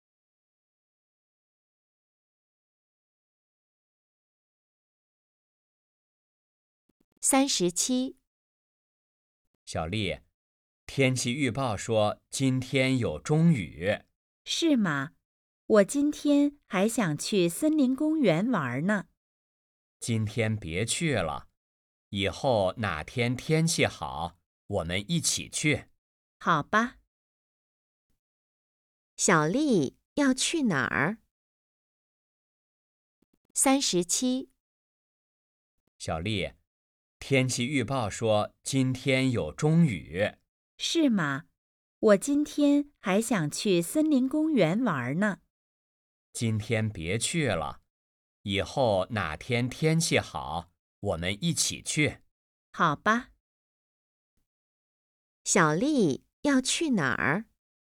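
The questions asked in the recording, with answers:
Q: 小丽要去哪儿?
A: 森林公园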